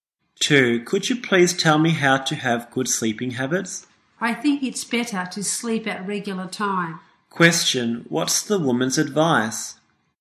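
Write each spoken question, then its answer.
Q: Question: What's the woman's advice?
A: Sleep at regular times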